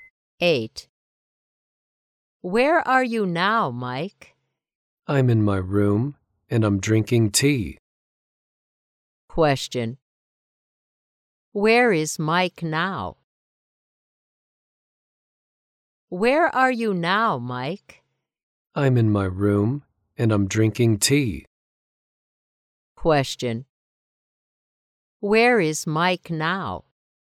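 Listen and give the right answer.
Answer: In his room.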